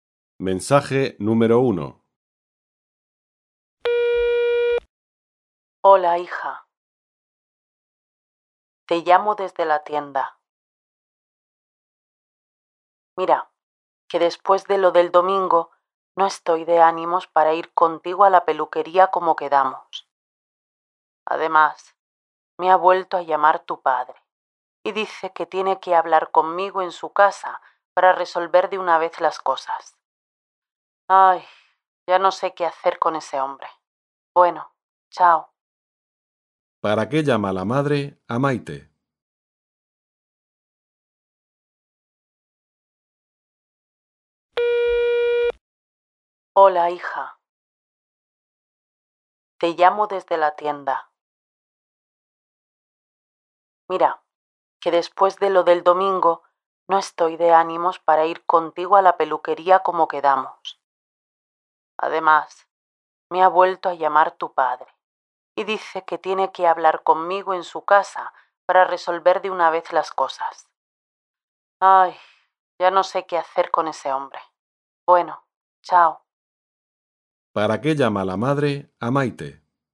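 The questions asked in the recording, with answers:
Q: ¿Para qué llama la madre a Maite?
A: Para decirle que no irá con ella a la peluquería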